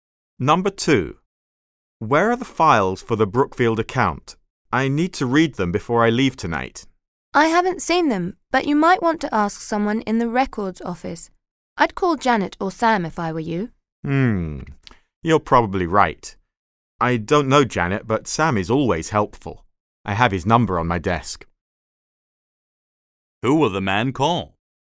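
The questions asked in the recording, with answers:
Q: Who will the man call?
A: Sam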